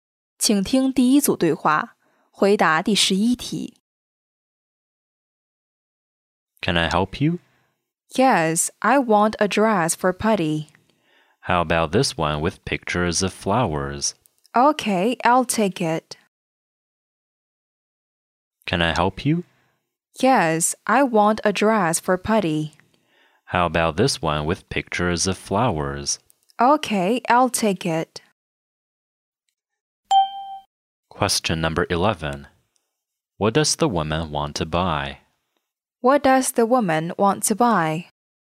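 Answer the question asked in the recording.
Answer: A dress for a party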